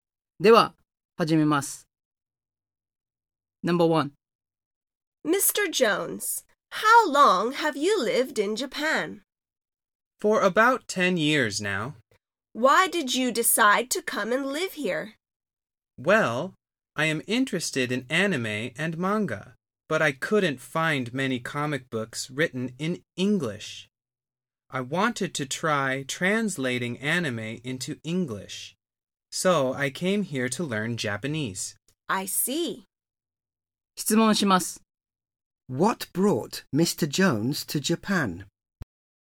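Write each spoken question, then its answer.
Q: What brought Mr. Jones to Japan?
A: He wanted to learn Japanese so he could translate anime into English.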